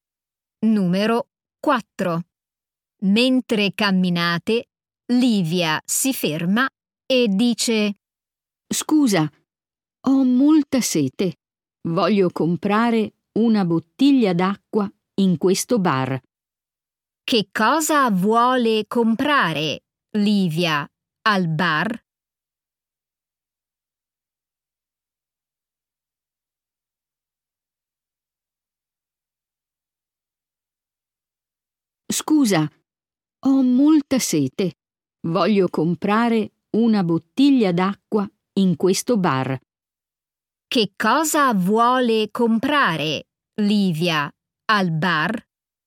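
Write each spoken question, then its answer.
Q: Che cosa vuole comprare Livia al bar?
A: Una bottiglia d'acqua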